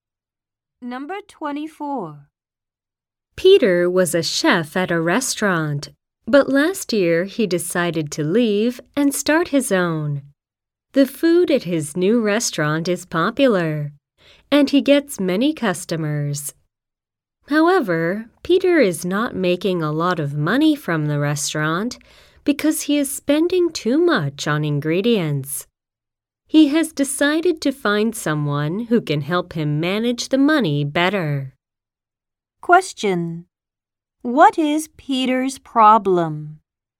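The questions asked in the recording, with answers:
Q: What is Peter's problem?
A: He spends too much on ingredients, so he is not making much money.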